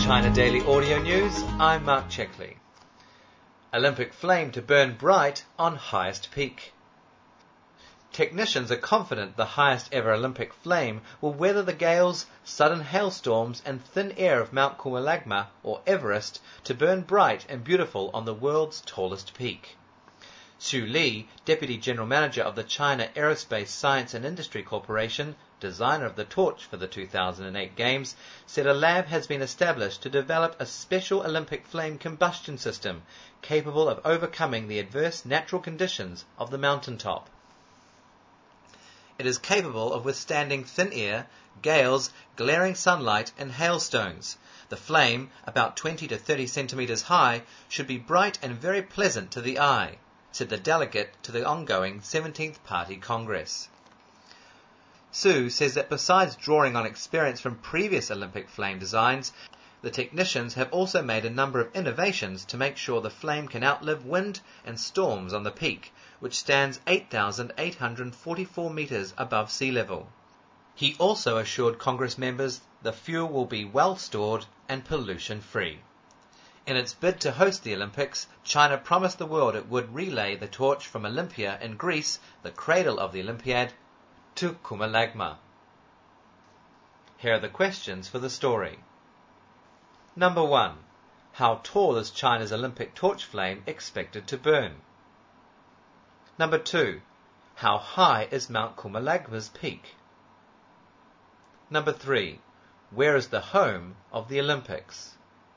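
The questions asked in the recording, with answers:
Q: How tall is China's Olympic torch flame expected to burn?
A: About 20 to 30 centimeters high

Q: How high is Mount Kumalagma's peak?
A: 8,844 meters above sea level

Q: Where is the home of the Olympics?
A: Olympia in Greece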